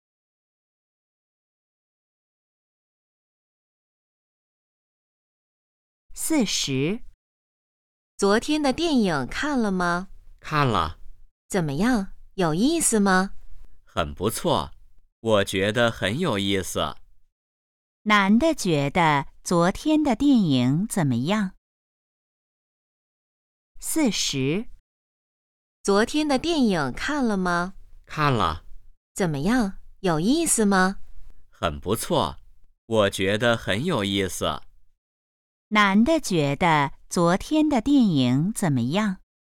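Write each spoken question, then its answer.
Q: 男的觉得昨天的电影怎么样?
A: 很有意思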